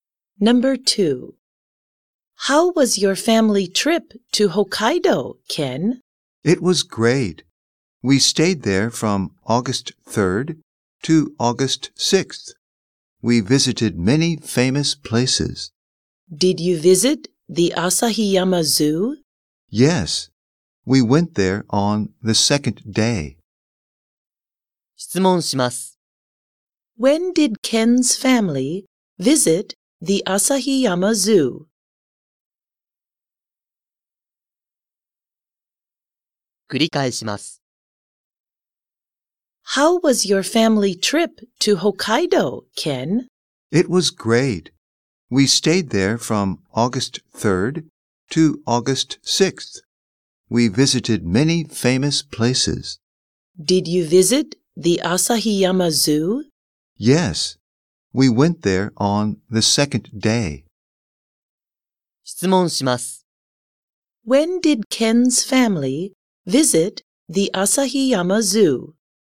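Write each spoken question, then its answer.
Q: When did Ken's family visit the Asahiyama Zoo?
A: On August 4th (the second day).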